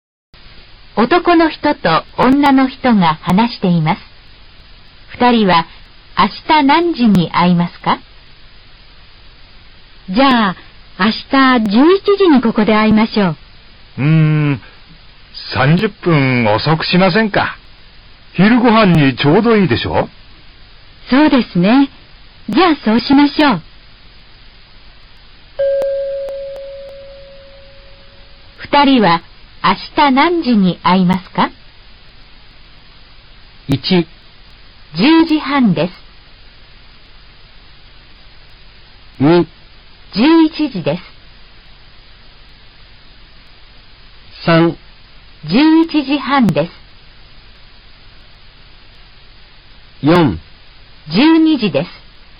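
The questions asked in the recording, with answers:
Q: 二人は明日何時に会いますか?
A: 3: 11時半です。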